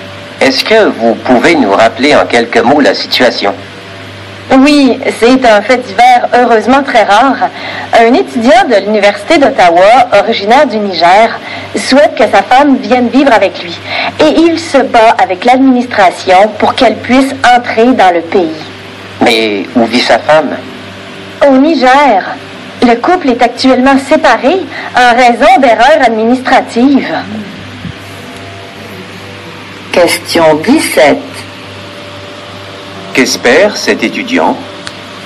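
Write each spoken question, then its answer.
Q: Qu'espère cet étudiant ?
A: Que sa femme vienne vivre avec lui au Canada (à Ottawa).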